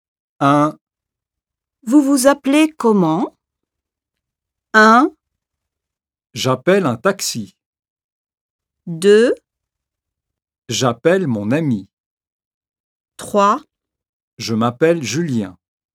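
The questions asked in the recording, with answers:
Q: Vous vous appelez comment?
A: 3: Je m'appelle Julien.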